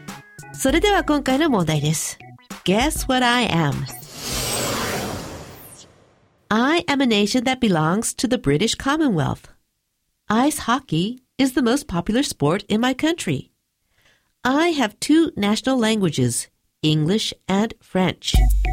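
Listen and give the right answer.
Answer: Canada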